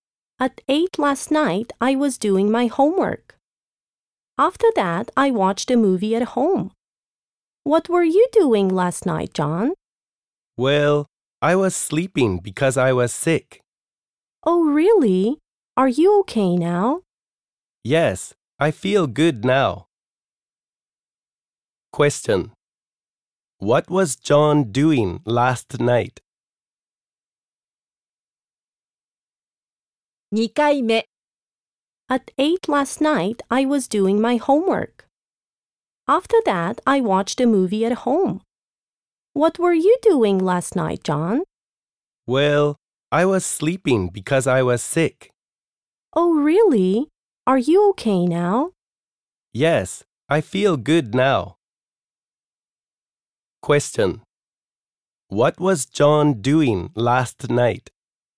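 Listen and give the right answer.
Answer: He was sleeping because he was sick.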